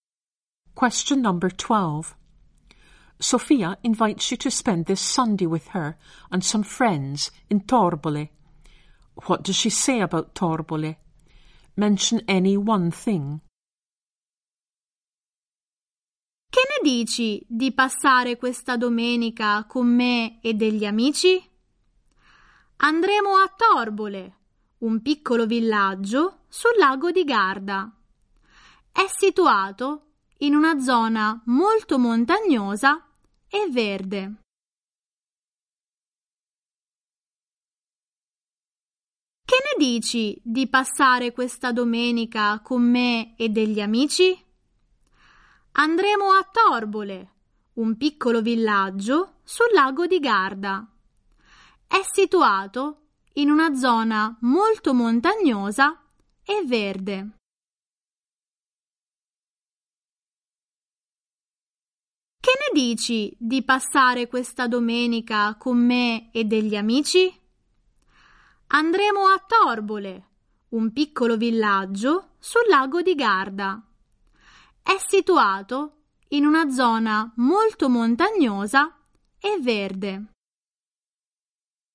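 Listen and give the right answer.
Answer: Small village on Lake Garda, in a very mountainous, green area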